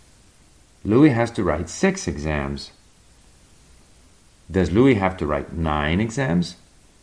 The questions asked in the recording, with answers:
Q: Does Louis have to write 9 exams?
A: No, Louis doesn't have to write 9 exams.